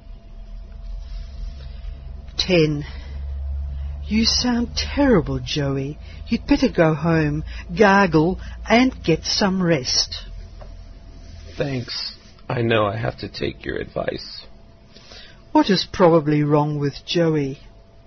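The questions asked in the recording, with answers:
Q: What is probably wrong with Joey?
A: He has a sore throat or cold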